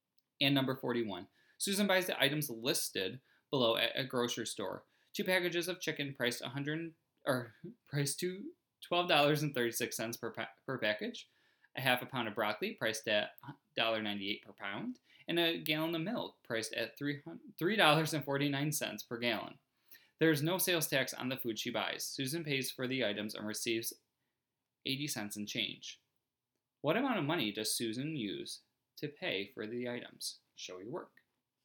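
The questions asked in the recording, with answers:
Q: What amount of money does Susan use to pay for the items?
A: $30.00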